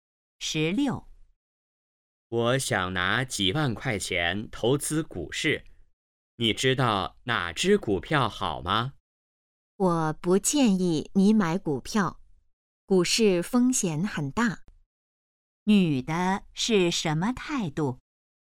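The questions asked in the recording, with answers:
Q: 女的是什么态度?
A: 不建议买股票(反对)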